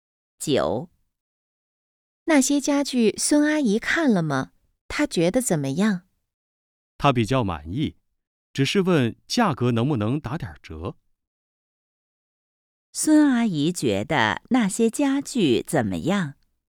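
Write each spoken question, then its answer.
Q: 孙阿姨觉得那些家具怎么样?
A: 比较满意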